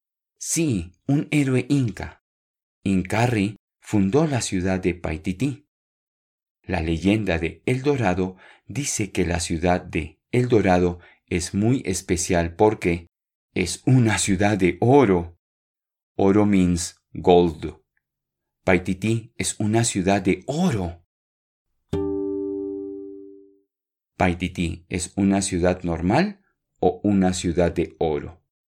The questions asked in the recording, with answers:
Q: Paititi es una ciudad normal o una ciudad de oro.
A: Sí, la leyenda de El Dorado dice que Paititi es una ciudad de oro.